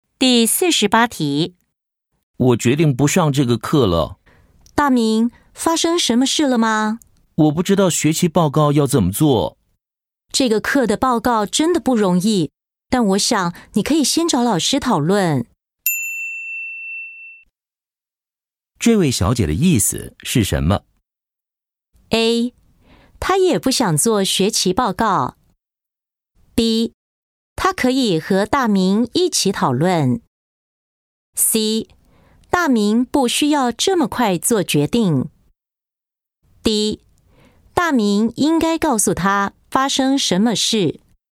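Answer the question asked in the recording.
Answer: C: 大明不需要这么快做决定。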